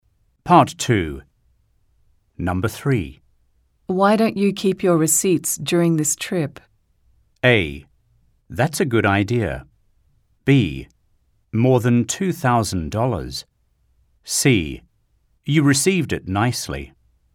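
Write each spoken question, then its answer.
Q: Why don't you keep your receipts during this trip?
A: A: That's a good idea.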